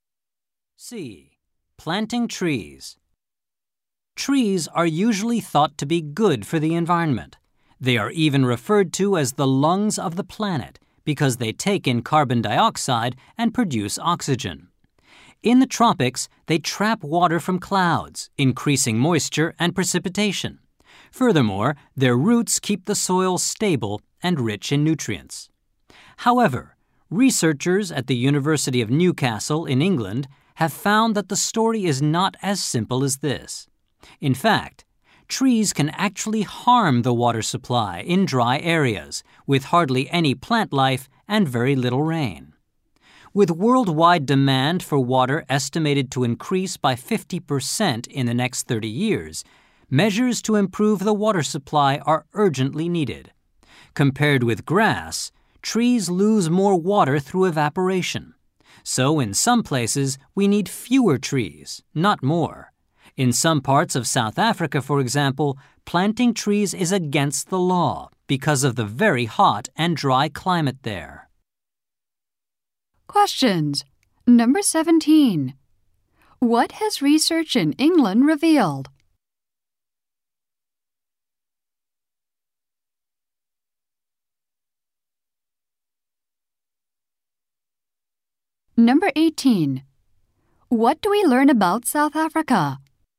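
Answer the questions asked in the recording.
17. Trees can harm the water supply in dry areas.
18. In some parts, planting trees is against the law.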